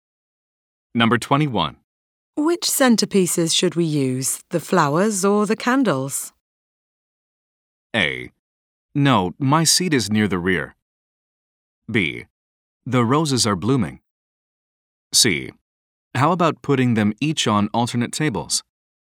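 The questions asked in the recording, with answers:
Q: Which centerpieces should we use, the flowers or the candles?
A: C: How about putting them each on alternate tables?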